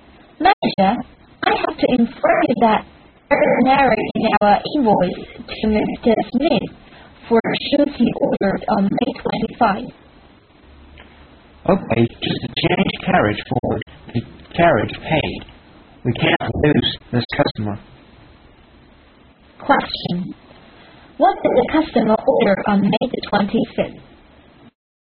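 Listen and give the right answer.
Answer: Shoes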